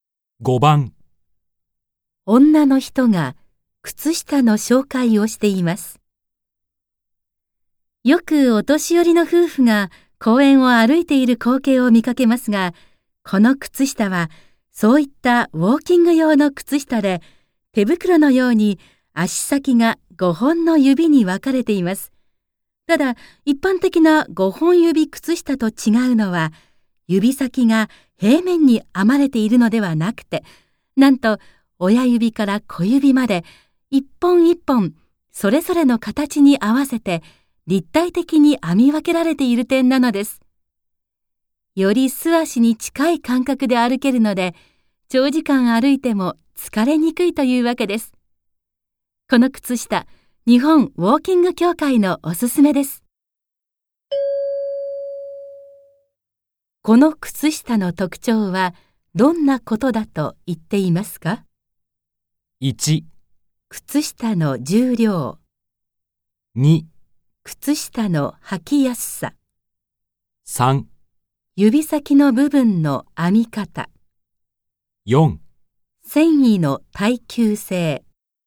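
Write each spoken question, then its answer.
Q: この靴下の特徴はどんなことだと言っていますか ?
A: 3: 指先の部分の編み方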